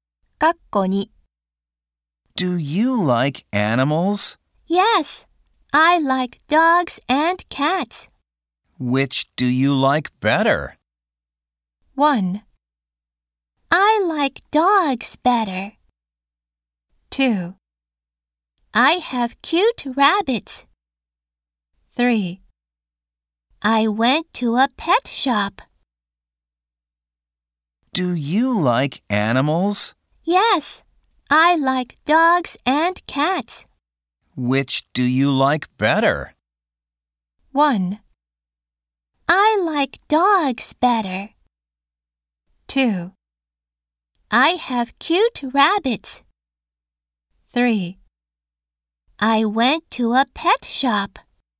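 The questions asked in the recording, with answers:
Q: Which do you like better?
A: 1: I like dogs better.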